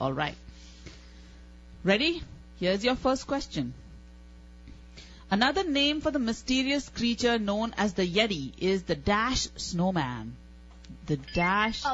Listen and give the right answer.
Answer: Abominable.